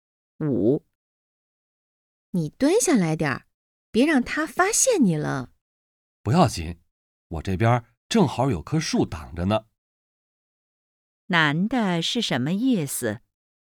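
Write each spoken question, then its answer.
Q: 男的是什么意思?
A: 有树挡着,不会被发现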